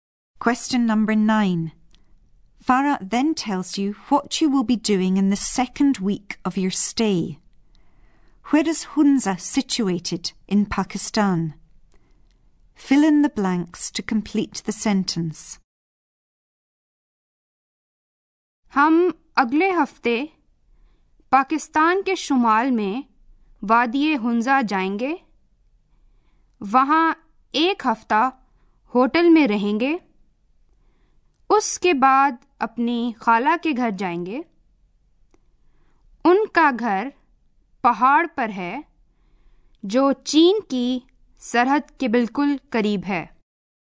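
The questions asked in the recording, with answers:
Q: Where is Hunza situated in Pakistan?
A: In the north of Pakistan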